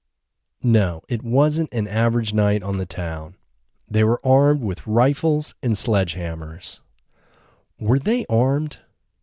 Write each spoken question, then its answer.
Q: Were they armed?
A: Yes, they were armed.